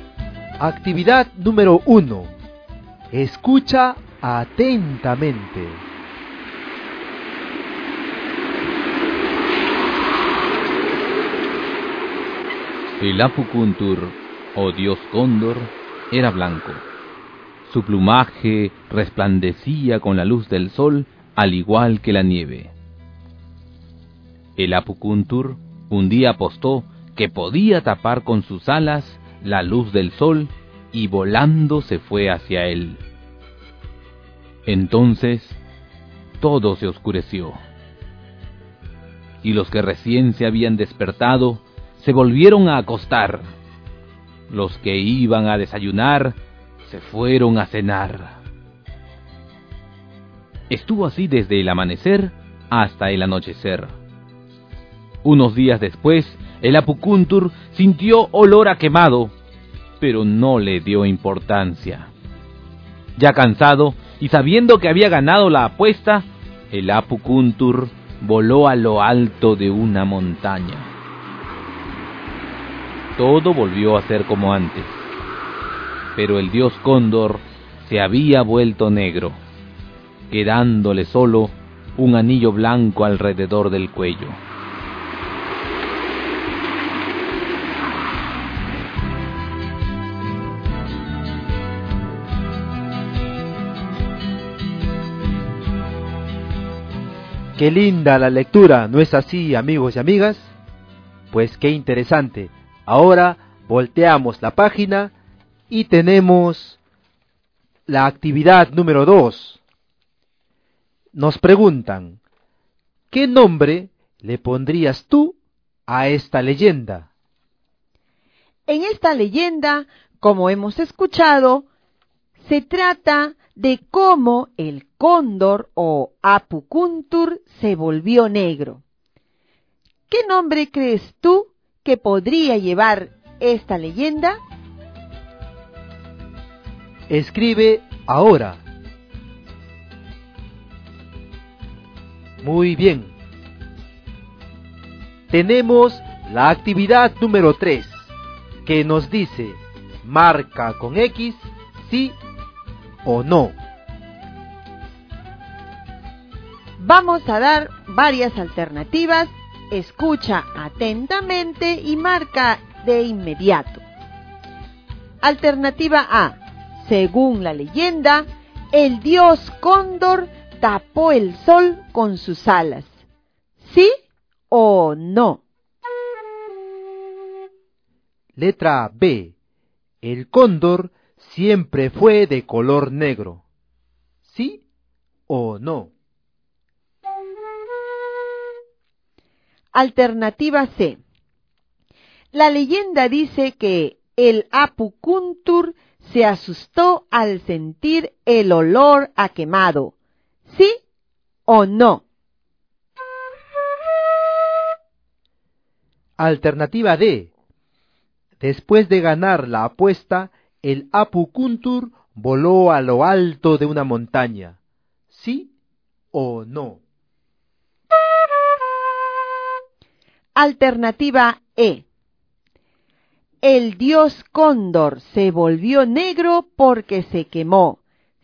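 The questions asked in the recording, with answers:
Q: Alternativa A. Según la leyenda, el dios cóndor tapó el sol con sus alas.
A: Sí

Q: Letra B. El cóndor siempre fue de color negro.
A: No

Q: Alternativa C. La leyenda dice que el Apukuntur se asustó al sentir el olor a quemado.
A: No

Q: Alternativa D. Después de ganar la apuesta, el Apukuntur voló a lo alto de una montaña. ¿Sí o no?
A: Sí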